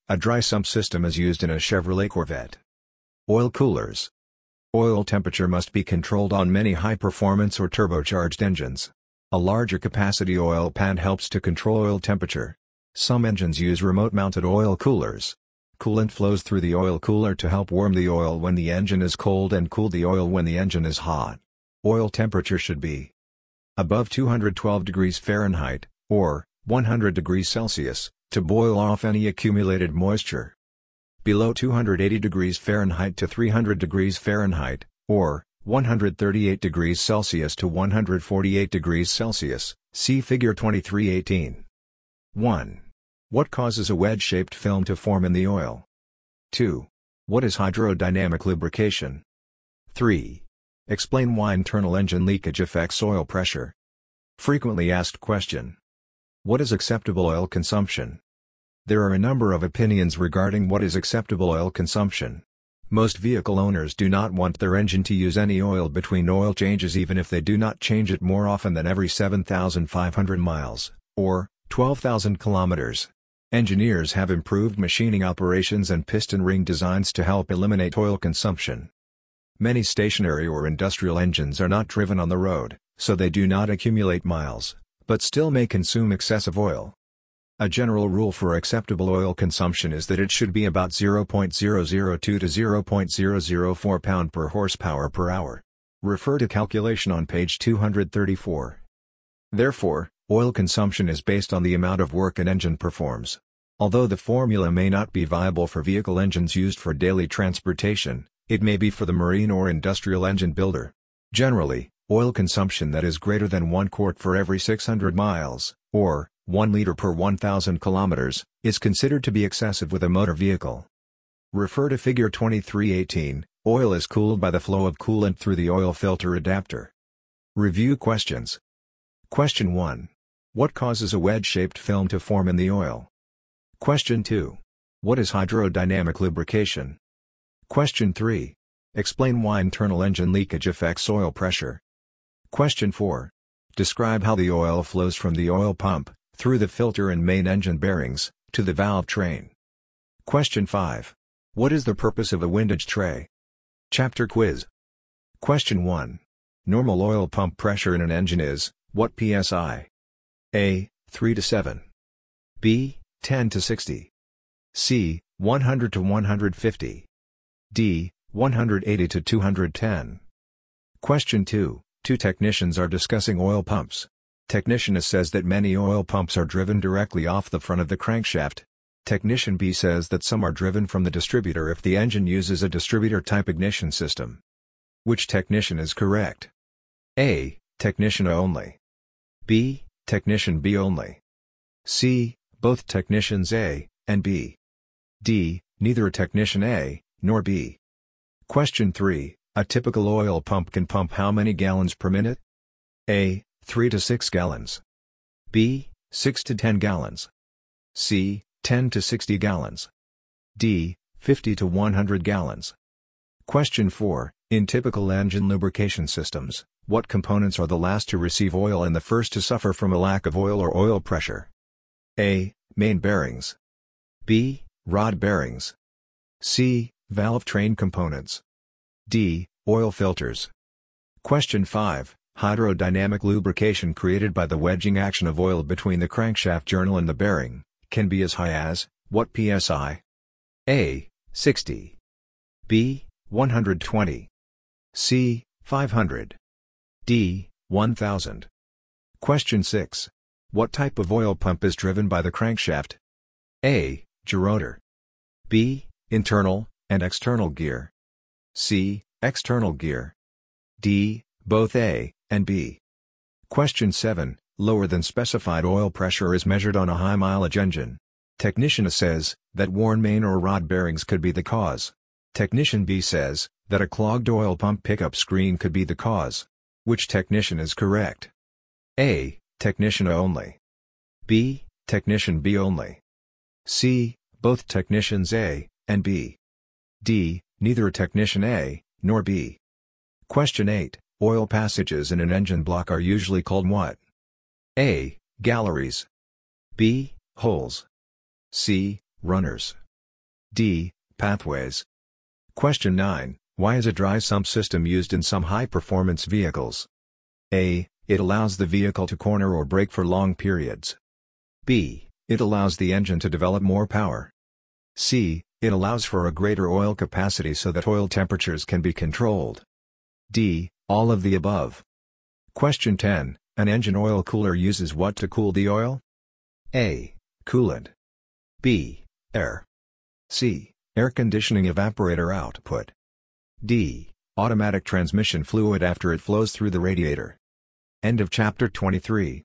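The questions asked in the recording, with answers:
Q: An engine oil cooler uses what to cool the oil?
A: A: Coolant.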